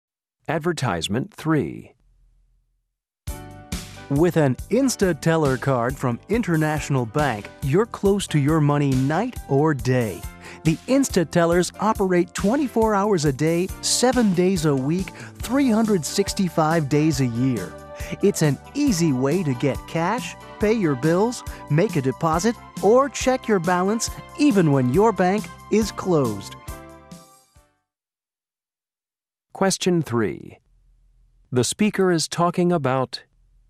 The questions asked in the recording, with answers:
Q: The speaker is talking about...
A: Instateller automated teller machines.